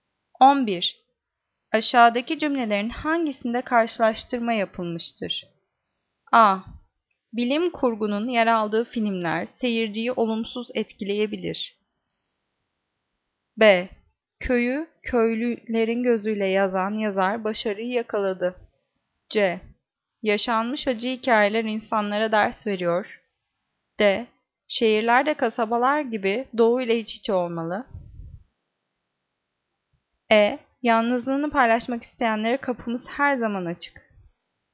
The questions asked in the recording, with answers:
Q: Aşağıdaki cümlelerin hangisinde karşılaştırma yapılmıştır?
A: Cevap D. Şehirlerde kasabalar gibi doğu ile iç içe olmalı.